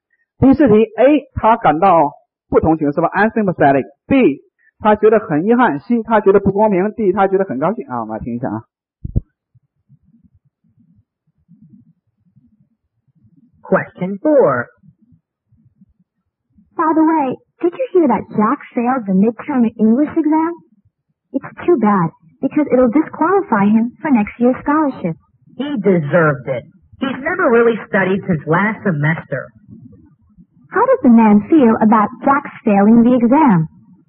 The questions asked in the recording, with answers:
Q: How does the man feel about Jack failing the exam?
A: 他活该啊